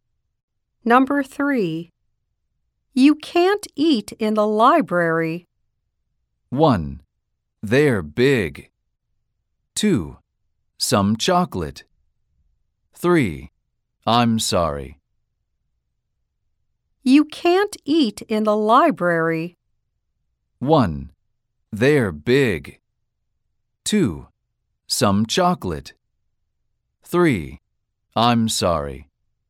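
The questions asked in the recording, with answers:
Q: You can't eat in the library.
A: 3: I'm sorry.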